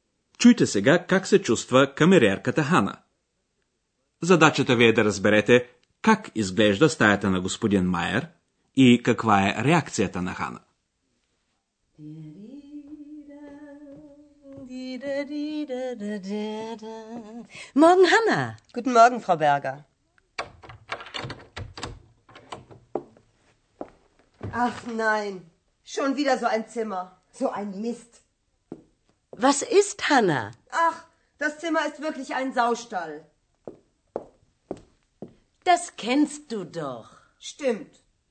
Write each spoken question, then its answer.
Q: Задачата ви е да разберете как изглежда стаята на господин Майер и каква е реакцията на Хана.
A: Ханна намира, че стаята прилича на кочина и е много ядосана.